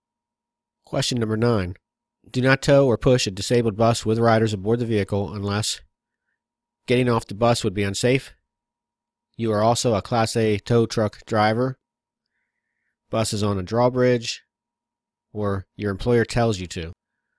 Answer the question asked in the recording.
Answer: It's A, getting off the bus would be unsafe.